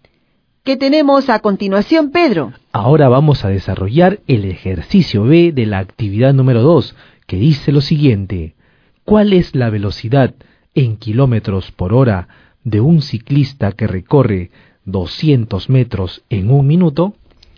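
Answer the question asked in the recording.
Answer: 12 km/h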